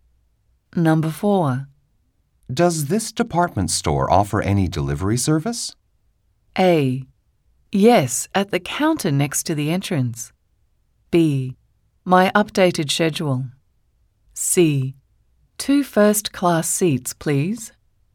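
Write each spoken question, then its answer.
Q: Does this department store offer any delivery service?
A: A: Yes, at the counter next to the entrance.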